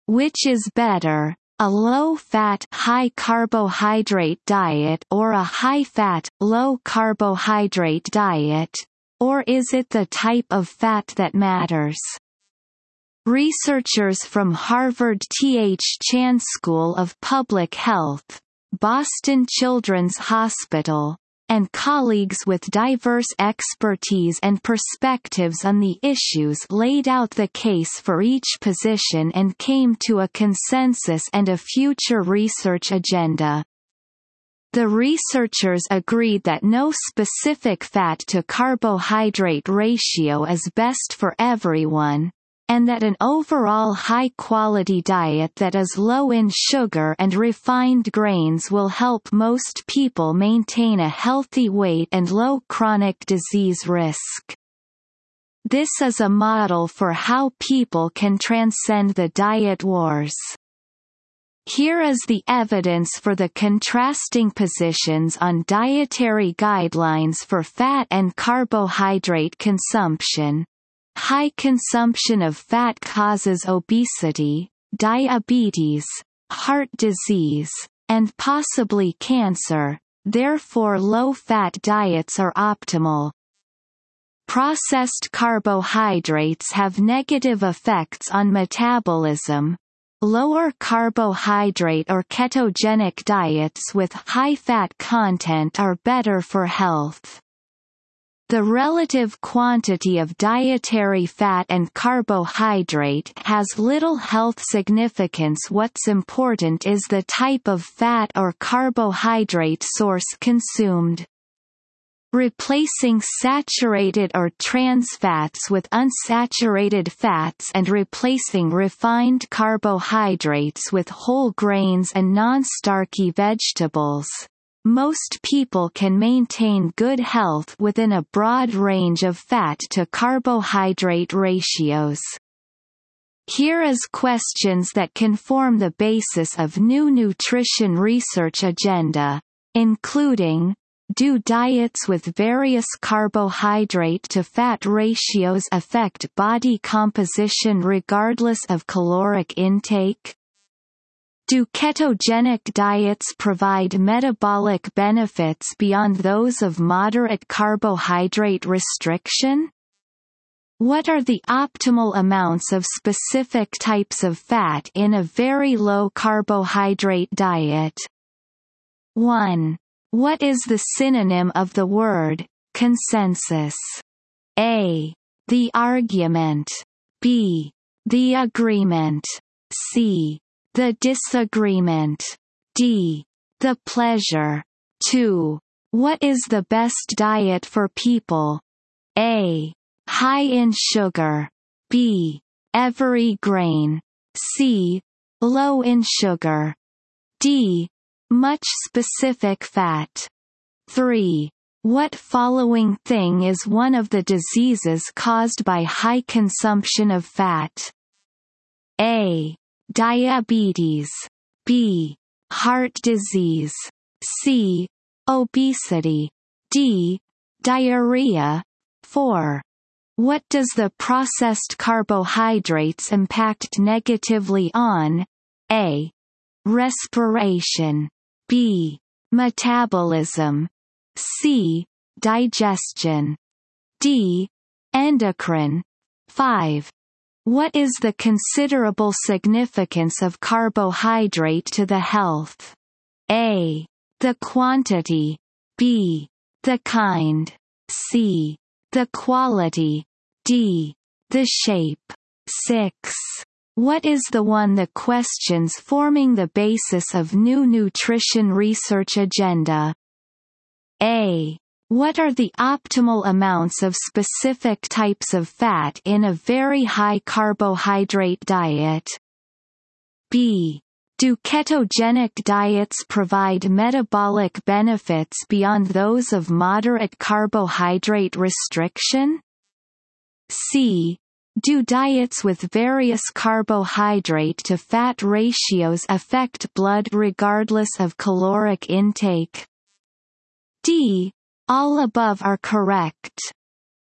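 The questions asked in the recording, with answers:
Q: What is the synonym of the word consensus?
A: B: The agreement.

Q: What is the best diet for people?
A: C: Low in sugar.

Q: What does the processed carbohydrates impact negatively on?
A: B: Metabolism.

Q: What is the considerable significance of carbohydrate to the health?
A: B: The kind.

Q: What is the one the questions forming the basis of new nutrition research agenda?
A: B: Do ketogenic diets provide metabolic benefits beyond those of moderate carbohydrate restriction?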